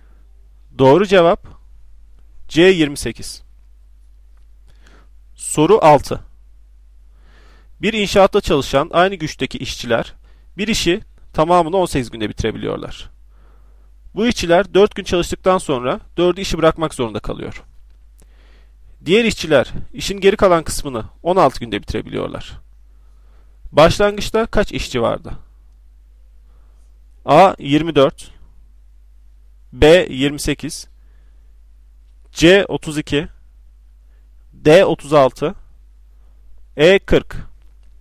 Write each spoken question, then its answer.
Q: Başlangıçta kaç işçi vardı?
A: Doğru cevap C 32.